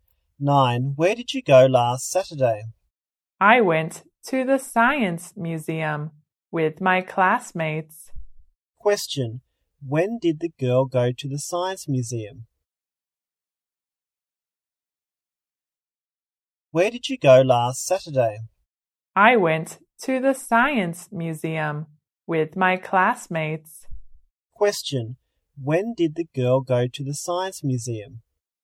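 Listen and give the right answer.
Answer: Last Saturday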